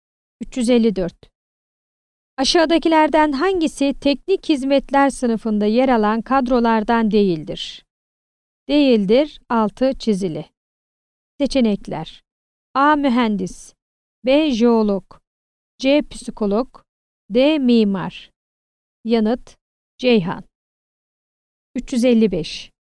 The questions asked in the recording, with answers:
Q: Aşağıdakilerden hangisi teknik hizmetler sınıfında yer alan kadrolardan değildir?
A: Yanıt: Ceyhan.